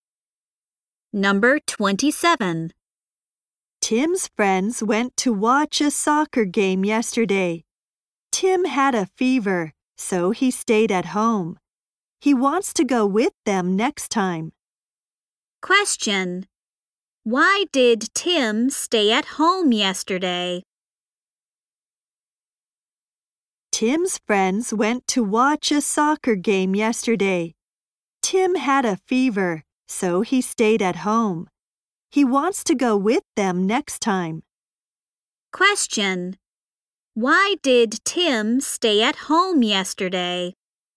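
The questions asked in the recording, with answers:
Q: Why did Tim stay at home yesterday?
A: He had a fever.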